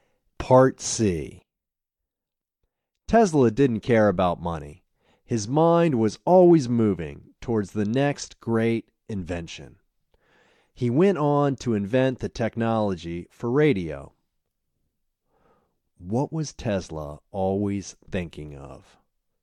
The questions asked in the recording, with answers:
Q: What was Tesla always thinking of?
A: Tesla was always thinking of the next great invention.